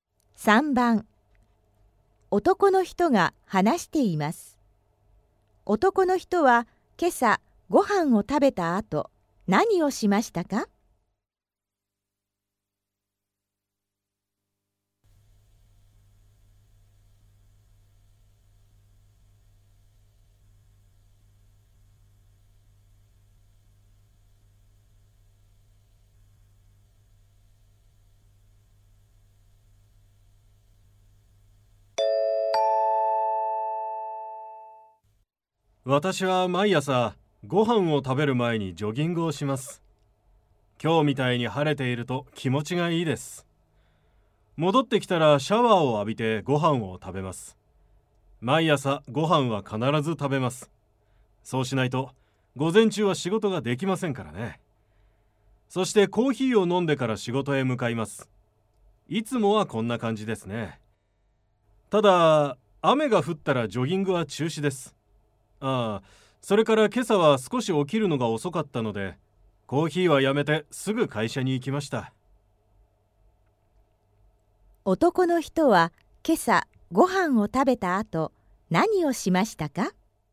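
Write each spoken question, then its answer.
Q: 男の人は今朝ご飯を食べた後、何をしましたか?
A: コーヒーを飲まずにすぐ会社に行った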